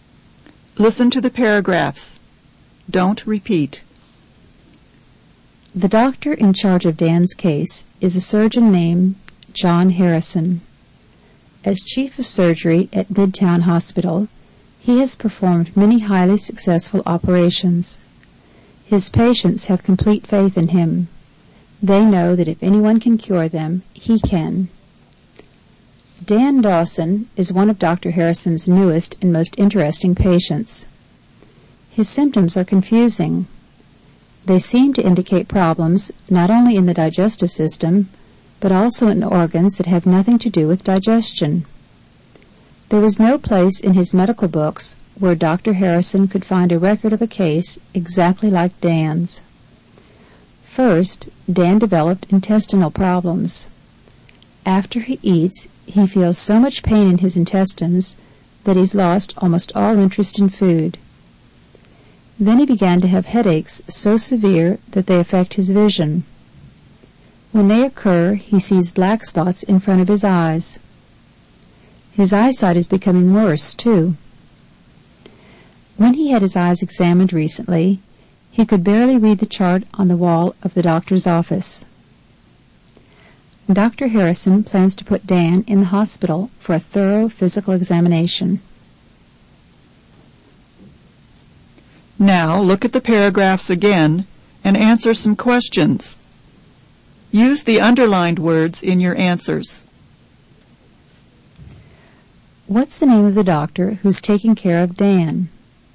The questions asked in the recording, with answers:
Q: What's the name of the doctor who's taking care of Dan?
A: The doctor in charge of Dan's case is named John Harrison.